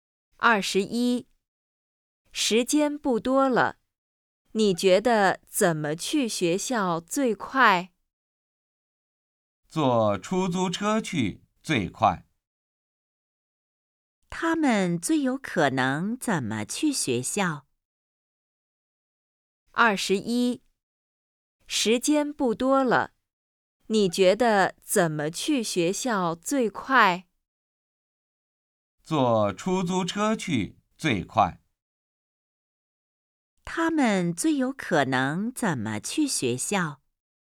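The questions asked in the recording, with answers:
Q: 他们最有可能怎么去学校?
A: 坐出租车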